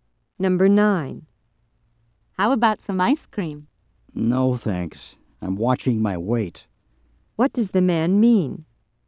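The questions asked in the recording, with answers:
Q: What does the man mean?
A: He doesn't want ice cream because he's trying not to gain weight.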